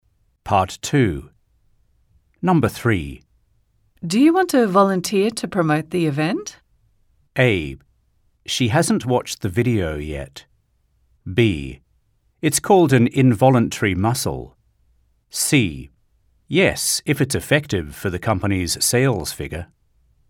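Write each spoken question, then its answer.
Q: Do you want to volunteer to promote the event?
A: C: Yes, if it's effective for the company's sales figure.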